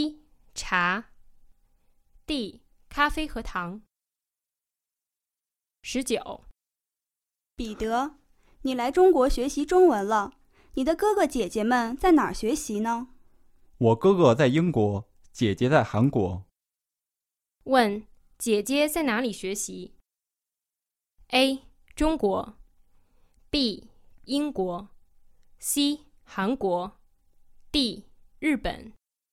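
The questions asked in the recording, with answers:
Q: 问,姐姐在哪里学习?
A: C: 韩国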